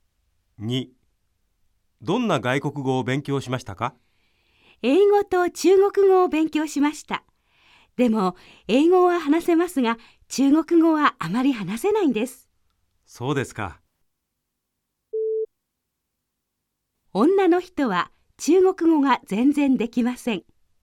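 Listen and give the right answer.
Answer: ×(正しくない:あまり話せないだけ)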